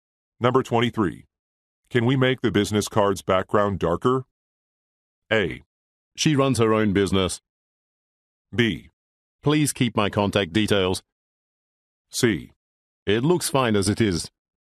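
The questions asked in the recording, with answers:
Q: Can we make the business card's background darker?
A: C: It looks fine as it is.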